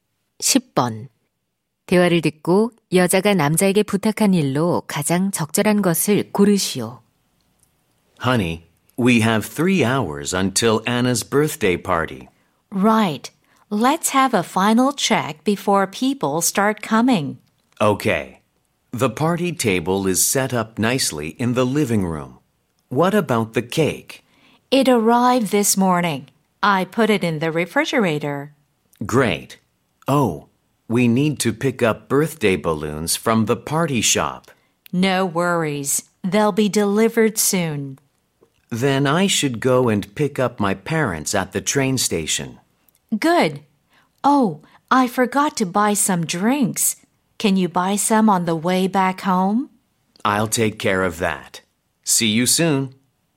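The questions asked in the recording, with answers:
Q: 대화를 듣고 여자가 남자에게 부탁한 일로 가장 적절한 것을 고르시오.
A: 음료 사 오기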